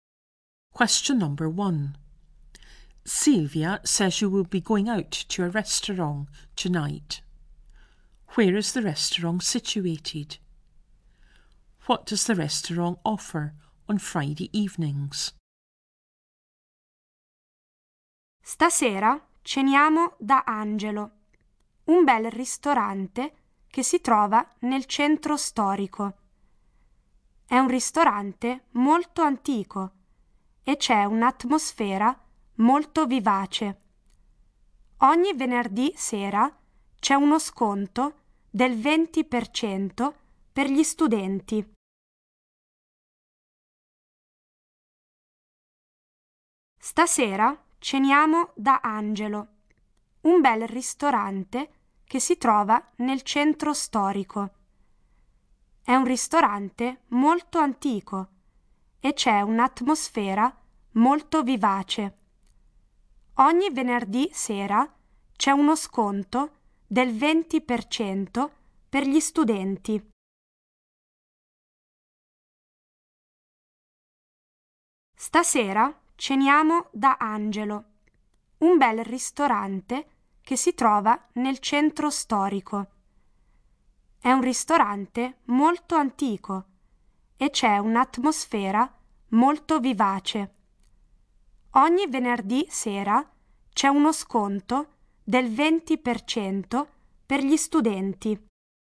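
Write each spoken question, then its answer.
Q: Where is the restaurant situated?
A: In the old town centre

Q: What does the restaurant offer on Friday evenings?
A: A 20% discount for students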